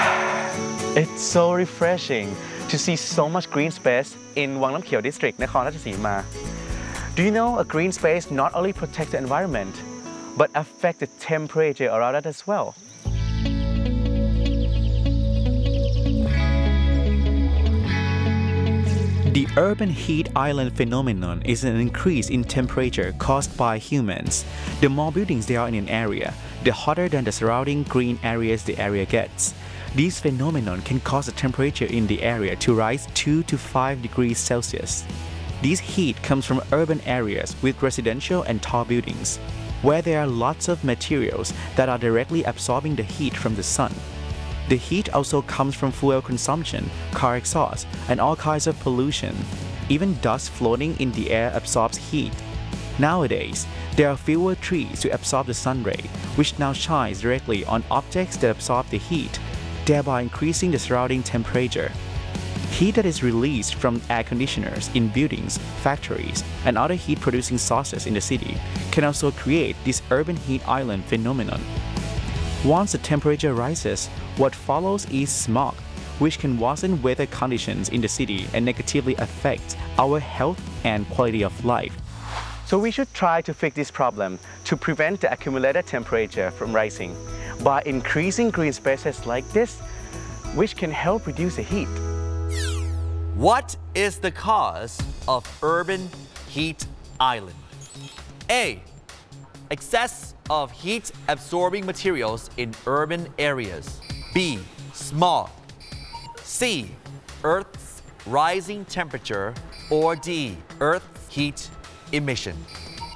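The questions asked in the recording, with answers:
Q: What is the cause of urban heat island?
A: A: Excess of heat-absorbing materials in urban areas.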